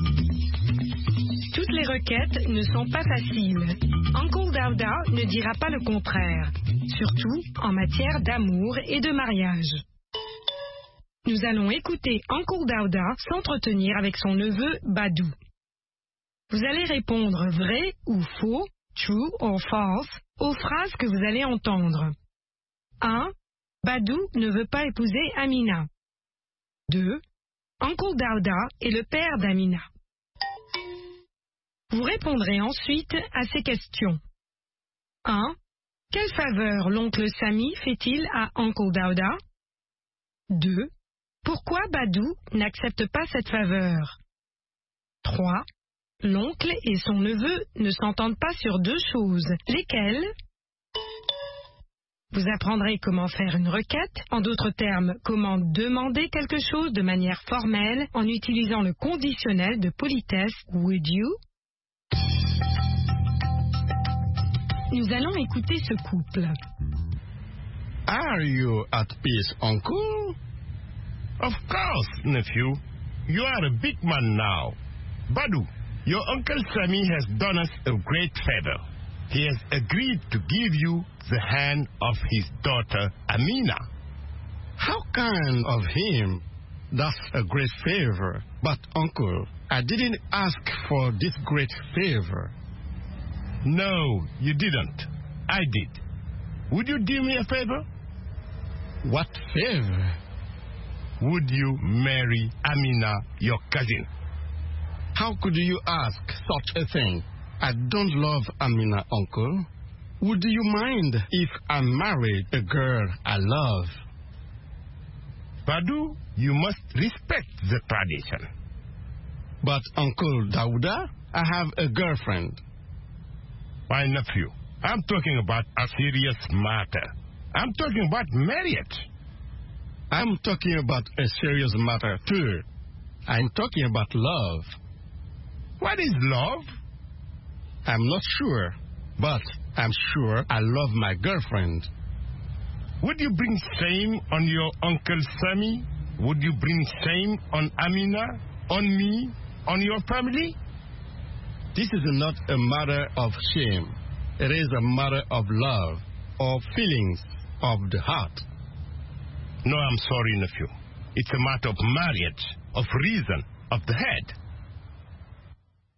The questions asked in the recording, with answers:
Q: Badou ne veut pas épouser Amina.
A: L'énoncé 1 est vrai. Badou ne veut pas épouser Amina.

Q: Uncle Dauda est le père d'Amina.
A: L'énoncé 2 est faux. Uncle Dauda est le père d'Amina.

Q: Quelle faveur l'oncle Sami fait-il à Uncle Dauda?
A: Il accepte d'accorder la main de sa fille à Badou.

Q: L'oncle et son neveu ne s'entendent pas sur deux choses.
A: Sur le mariage et sur l'amour.